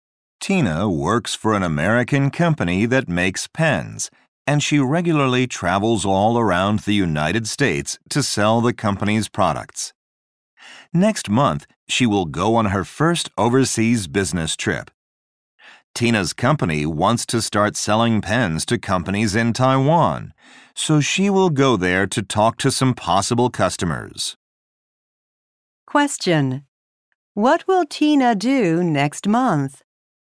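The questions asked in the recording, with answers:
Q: What will Tina do next month?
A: Go to Taiwan on a business trip to sell pens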